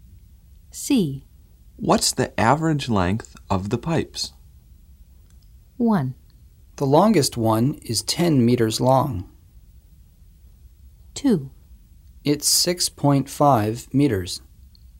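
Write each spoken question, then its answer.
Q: What's the average length of the pipes?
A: 2: It's 6.5 meters.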